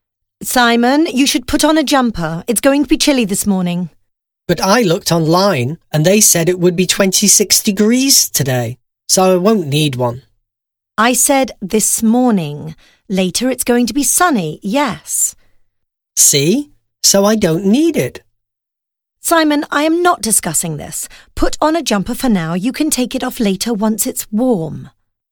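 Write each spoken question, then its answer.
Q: How is the weather going to be?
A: Chilly in the morning, sunny and warm (26 degrees) later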